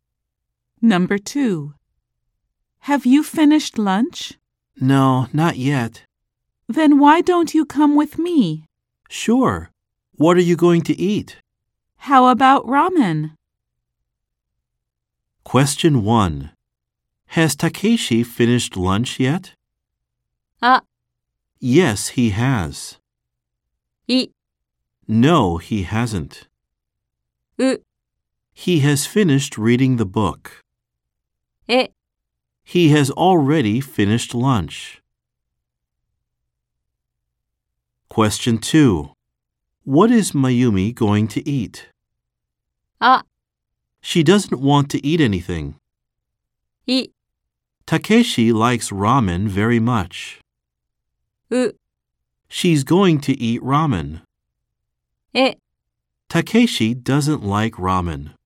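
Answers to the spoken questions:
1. い: No, he hasn't.
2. う: She's going to eat ramen.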